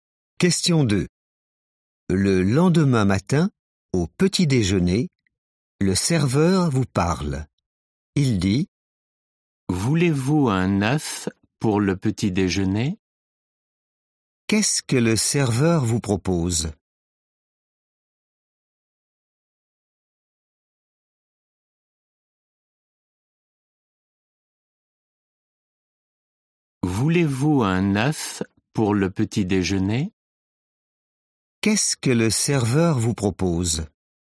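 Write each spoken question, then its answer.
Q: Qu'est-ce que le serveur vous propose ?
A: un œuf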